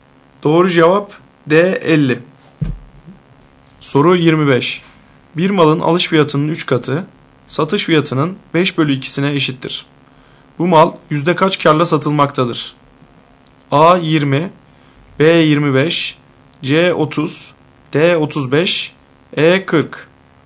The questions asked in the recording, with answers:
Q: Bu mal yüzde kaç kârla satılmaktadır?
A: Doğru cevap A 20.